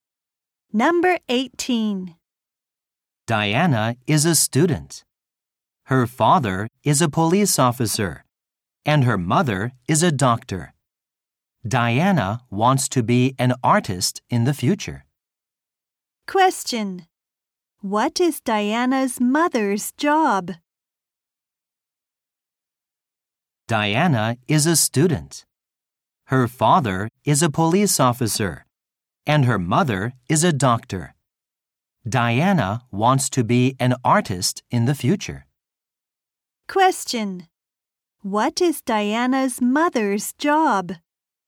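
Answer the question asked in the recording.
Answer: A doctor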